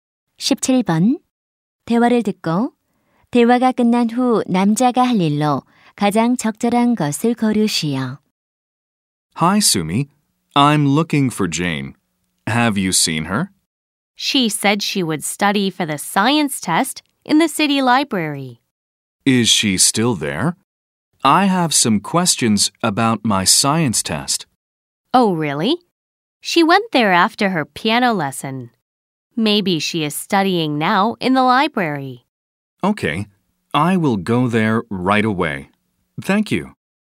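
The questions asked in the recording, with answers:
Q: 대화를 듣고 대화가 끝난 후 남자가 할 일로 가장 적절한 것을 고르시오.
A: 시립 도서관에 가기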